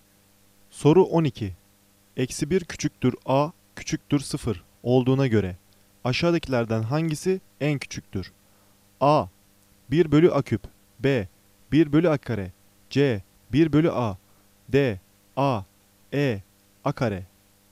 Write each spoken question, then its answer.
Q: Eksi 1 küçüktür A, küçüktür 0 olduğuna göre aşağıdakilerden hangisi en küçüktür?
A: Doğru cevap A. 1 bölü A küp.